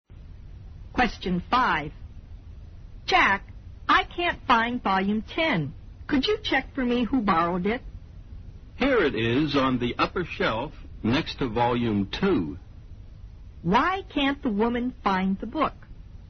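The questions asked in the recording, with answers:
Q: Why can't the woman find the book?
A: It was put in the wrong place, on the upper shelf next to volume 2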